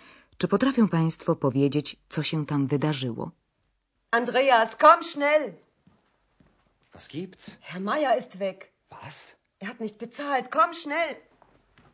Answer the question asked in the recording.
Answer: powodem zdenerwowania Hany jest nagłe zniknięcie pana Majera i to bez uregulowania rachunku za pokój.